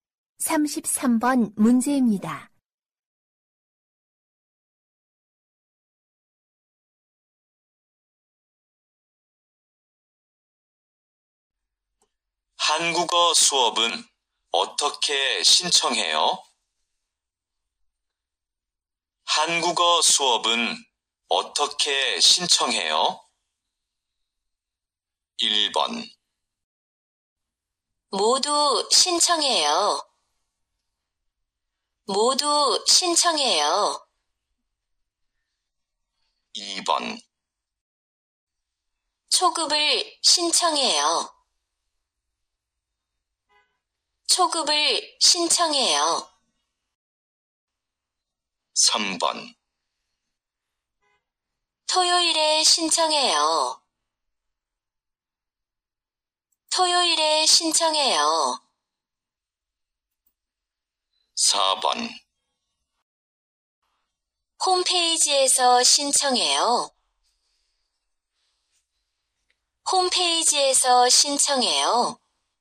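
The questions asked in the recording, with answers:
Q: 한국어 수업은 어떻게 신청해요?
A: 4: 홈페이지에서 신청해요.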